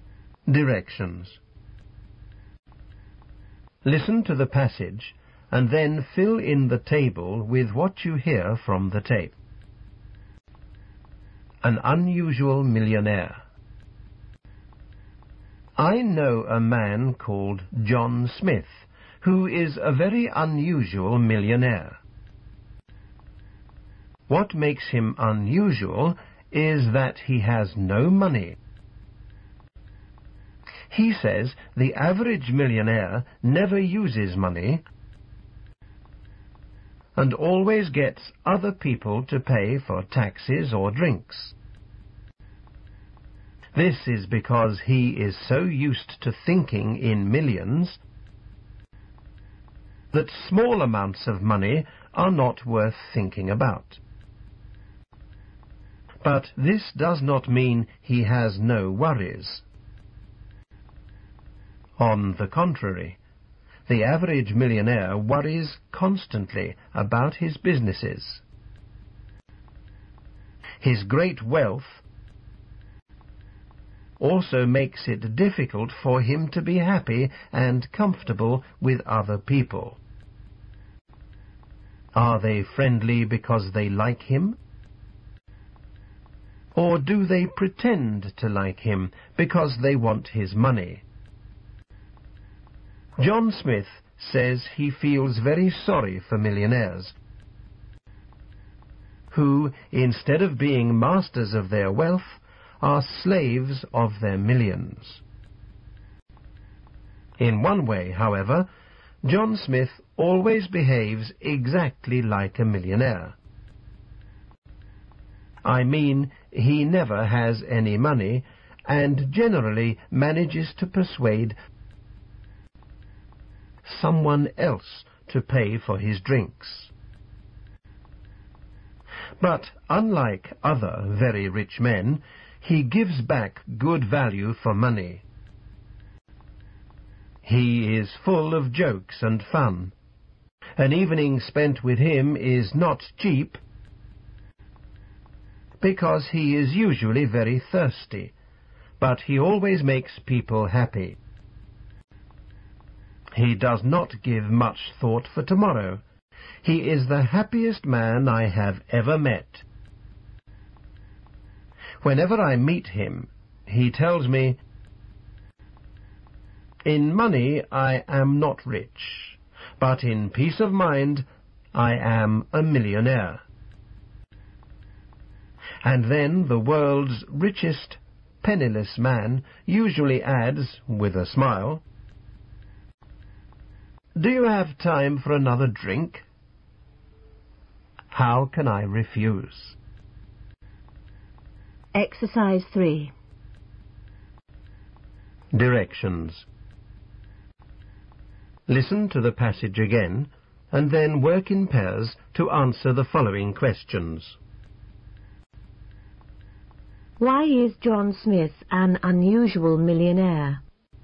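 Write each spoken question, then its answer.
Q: Why is John Smith an unusual millionaire?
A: Because he has no money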